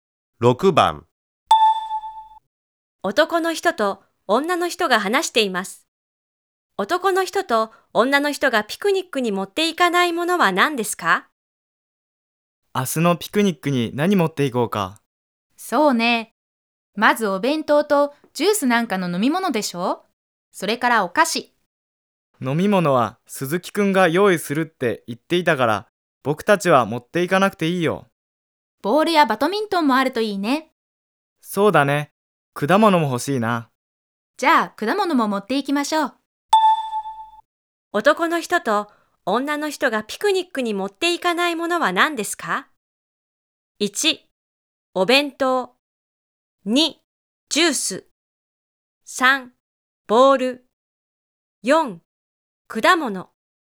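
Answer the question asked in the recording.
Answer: 2: ジュース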